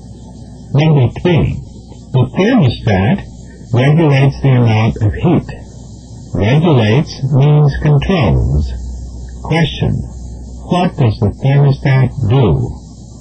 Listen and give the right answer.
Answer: It controls the amount of heat.